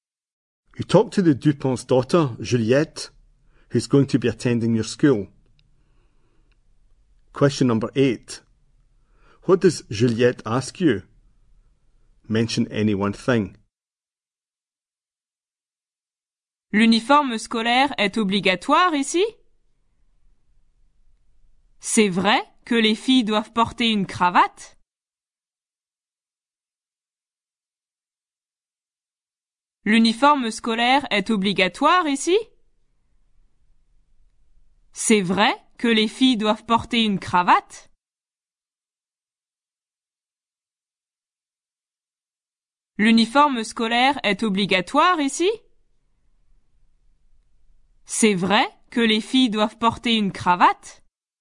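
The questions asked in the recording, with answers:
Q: What does Juliette ask you?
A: Is school uniform compulsory; do girls have to wear a tie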